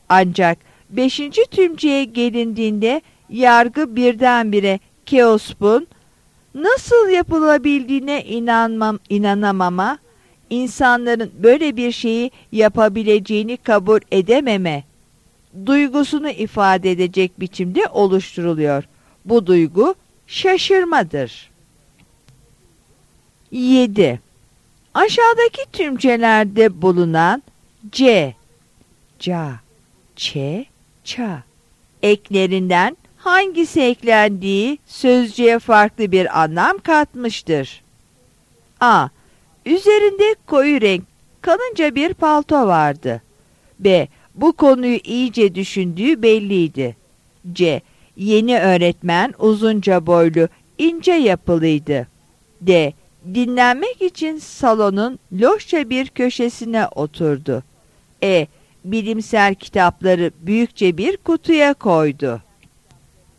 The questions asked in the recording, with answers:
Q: Aşağıdaki tümcelerde bulunan C, ca, çe, ça eklerinden hangisi eklendiği sözcüğe farklı bir anlam katmıştır?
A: Yanıt B'dir.